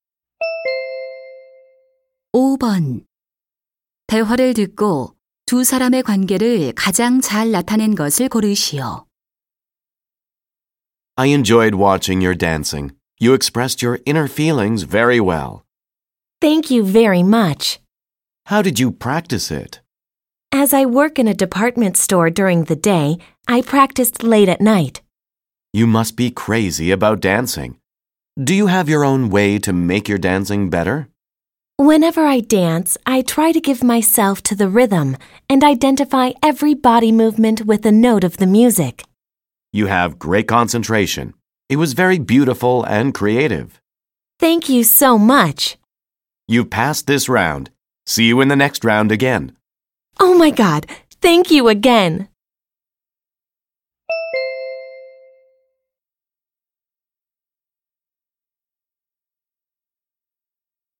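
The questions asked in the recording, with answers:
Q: 대화를 듣고 두 사람의 관계를 가장 잘 나타낸 것을 고르시오.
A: 댄스 오디션 심사위원 - 참가자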